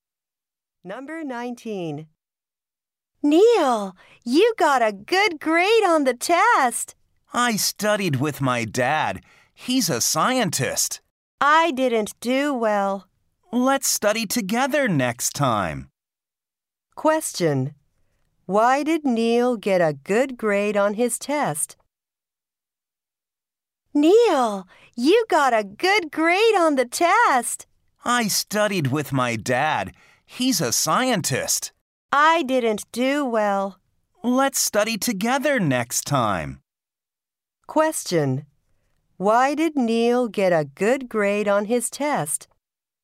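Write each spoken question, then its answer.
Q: Why did Neil get a good grade on his test?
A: He studied with his dad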